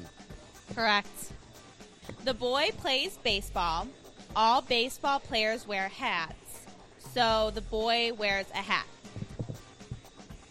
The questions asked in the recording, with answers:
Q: So the boy wears a hat.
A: True.